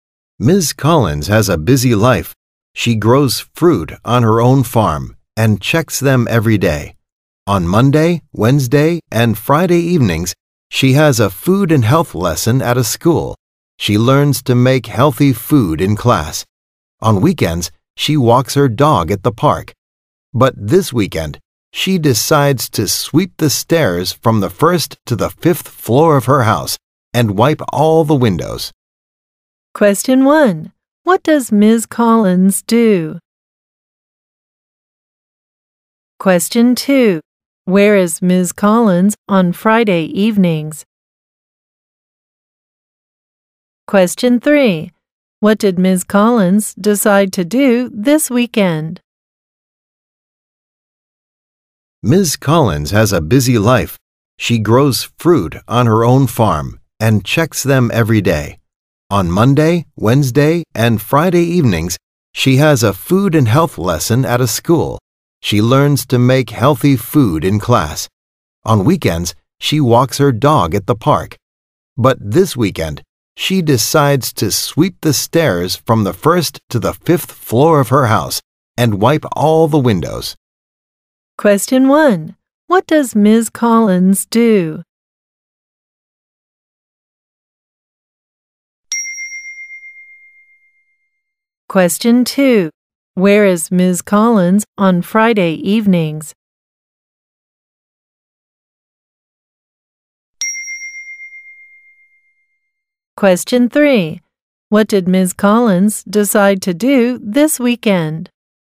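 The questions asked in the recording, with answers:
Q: Where is Ms. Collins on Friday evenings?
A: At a school (food and health lesson).

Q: What did Ms. Collins decide to do this weekend?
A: Sweep the stairs of her house and wipe all the windows.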